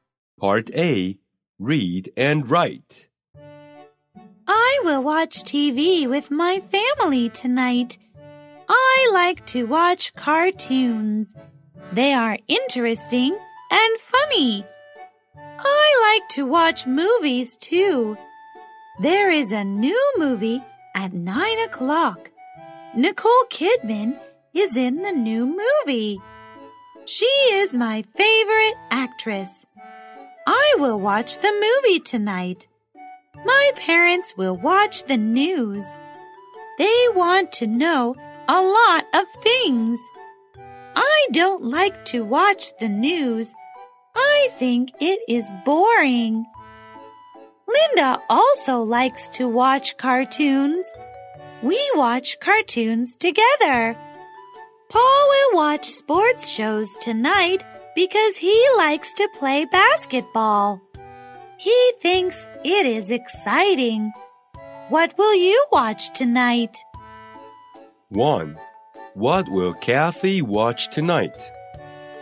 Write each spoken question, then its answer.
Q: What will Kathy watch tonight?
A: She will watch a movie tonight.